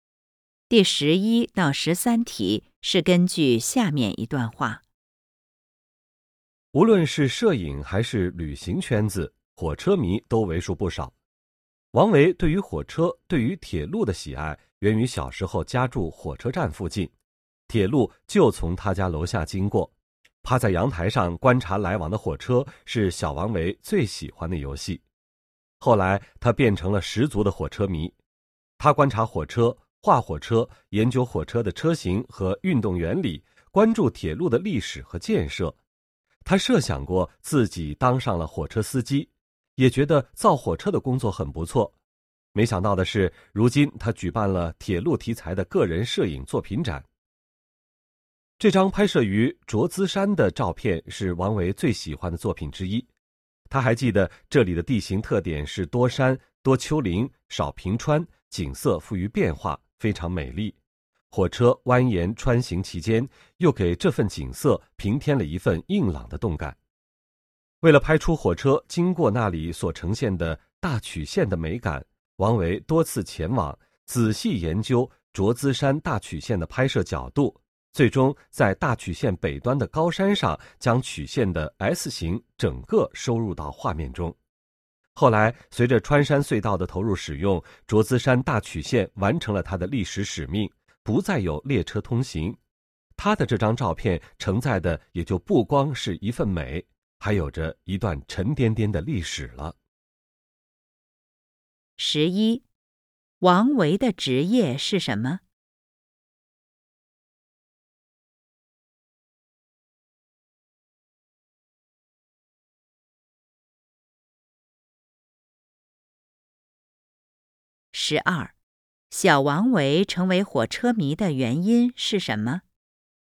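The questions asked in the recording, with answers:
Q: 小王维成为火车迷的原因是什么?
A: 小时候家住火车站附近,铁路从他家楼下经过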